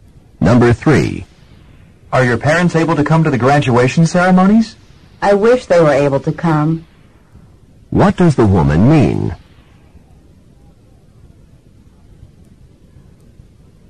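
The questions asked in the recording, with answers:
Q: What does the woman mean?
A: Her parents can't come.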